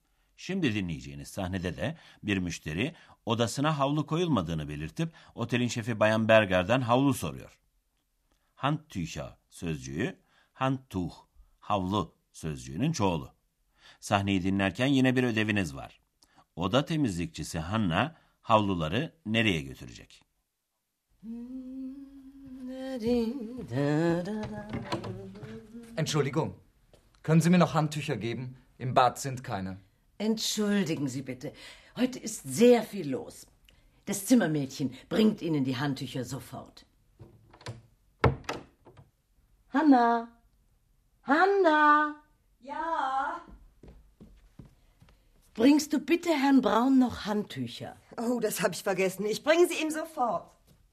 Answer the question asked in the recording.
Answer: Evet, Hanna'nın eksik havluları Bay Brown'a götürmesi istendi.